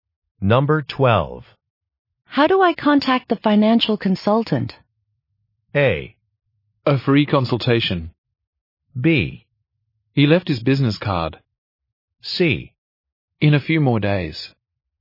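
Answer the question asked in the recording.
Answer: B: He left his business card.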